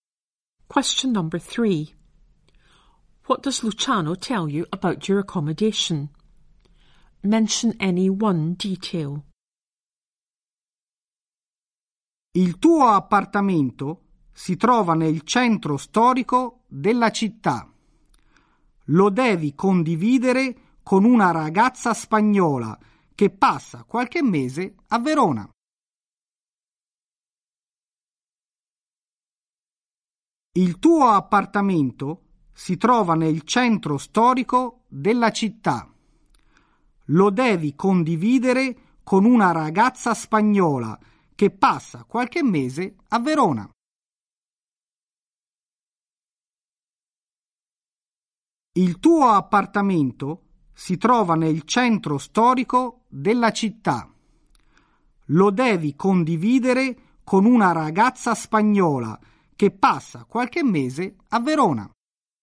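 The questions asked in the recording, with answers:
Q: What does Luciano tell you about your accommodation?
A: The flat is in the historic town centre; shared with a Spanish girl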